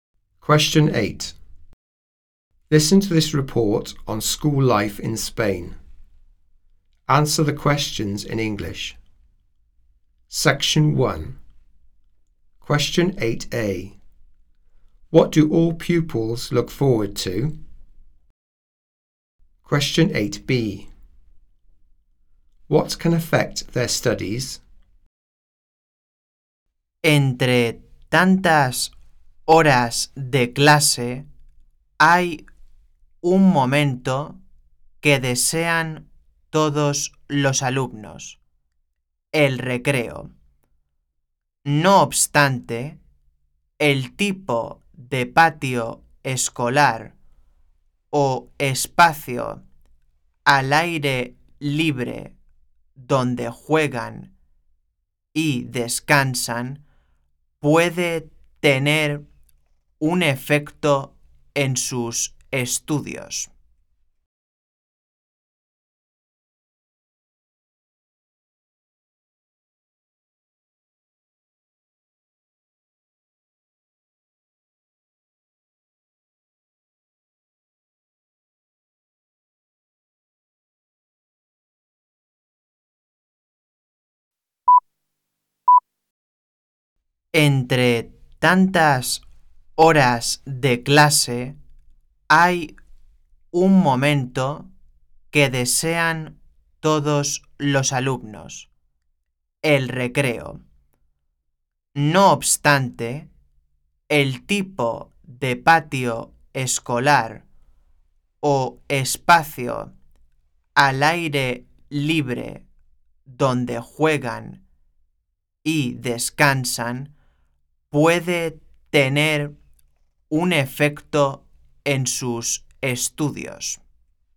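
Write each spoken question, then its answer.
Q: What do all pupils look forward to?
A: Break time

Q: What can affect their studies?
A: The type of playground or outdoor space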